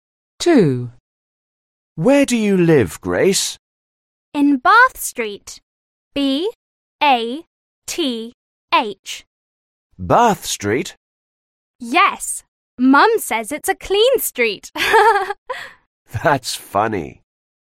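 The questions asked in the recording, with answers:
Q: Where do you live, Grace?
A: Bath Street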